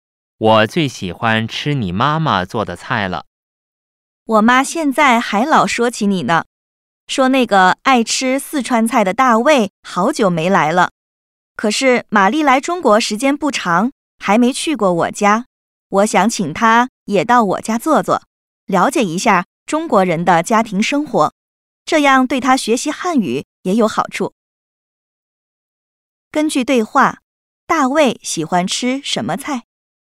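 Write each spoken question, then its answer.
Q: 根据对话,大卫喜欢吃什么菜?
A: 四川菜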